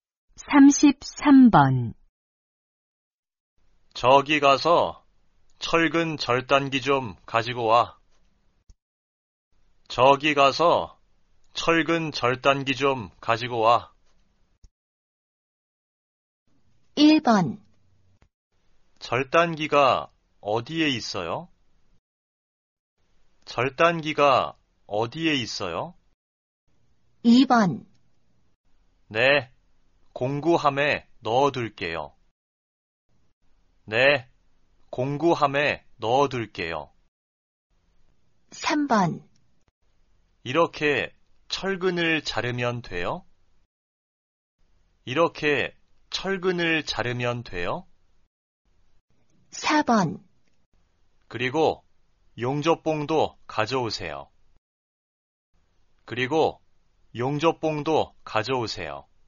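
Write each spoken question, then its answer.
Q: 저기가서철근절단기좀가지고와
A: 1: 절단기가어디에있어요?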